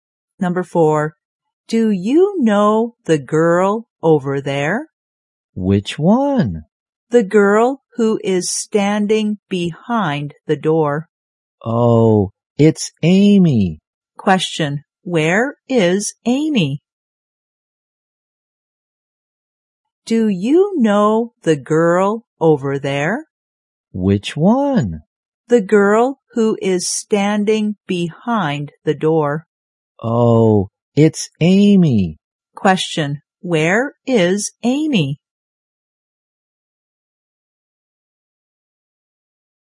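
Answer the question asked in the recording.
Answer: Behind the door.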